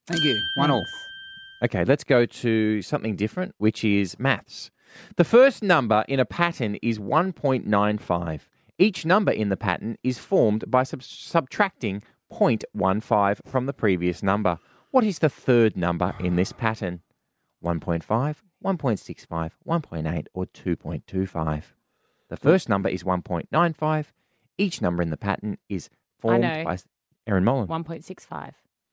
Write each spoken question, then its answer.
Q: What is the third number in this pattern?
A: 1.65.